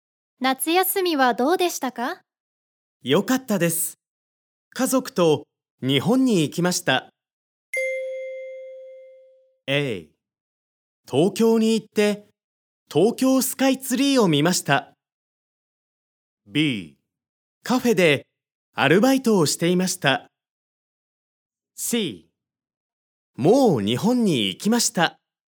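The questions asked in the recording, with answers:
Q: 夏休みはどうでしたか?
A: A: 東京に行って東京スカイツリーを見ました。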